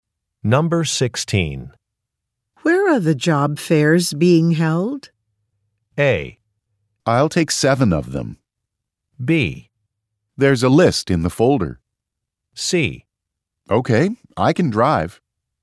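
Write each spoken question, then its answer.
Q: Where are the job fairs being held?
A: B: There's a list in the folder.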